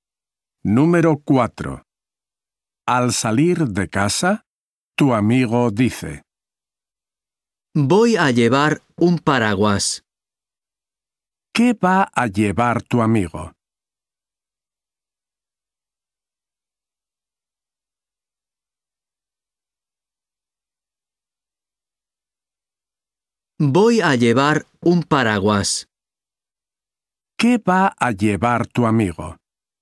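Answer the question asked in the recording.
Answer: Un paraguas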